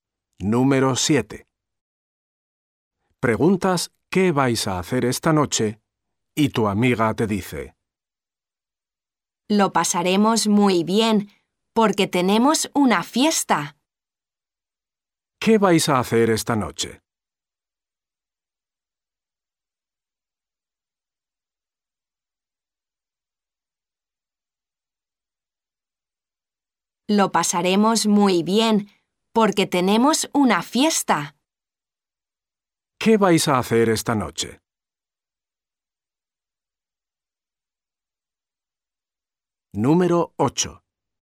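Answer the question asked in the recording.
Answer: Ir a una fiesta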